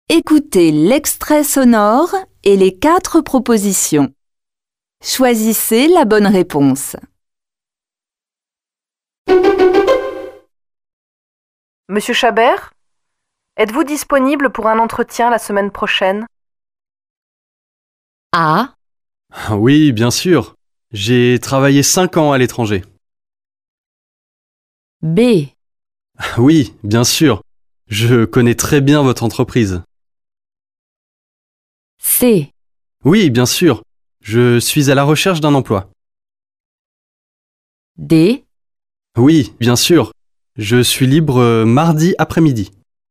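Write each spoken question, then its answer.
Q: Monsieur Chabert, êtes-vous disponible pour un entretien la semaine prochaine?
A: D: Oui, bien sûr. Je suis libre mardi après-midi.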